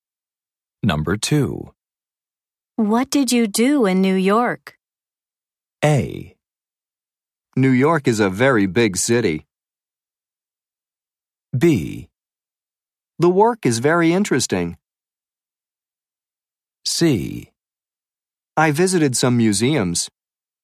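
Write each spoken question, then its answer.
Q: What did you do in New York?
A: C: I visited some museums.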